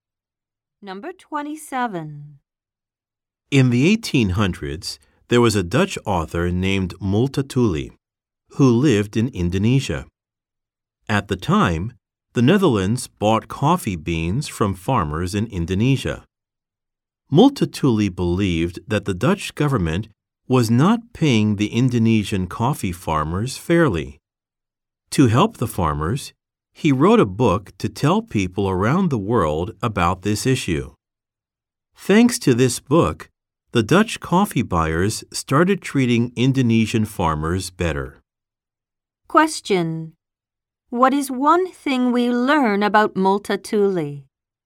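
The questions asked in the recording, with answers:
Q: What is one thing we learn about Multatuli?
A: He wrote a book to help Indonesian coffee farmers get treated fairly.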